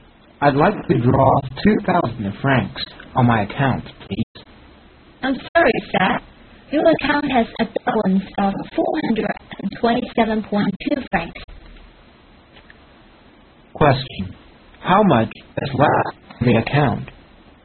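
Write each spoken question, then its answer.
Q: How much is left in the account?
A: 427.2 francs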